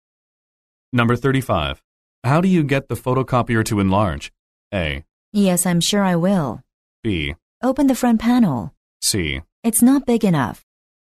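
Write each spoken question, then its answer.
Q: How do you get the photocopier to enlarge?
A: B: Open the front panel.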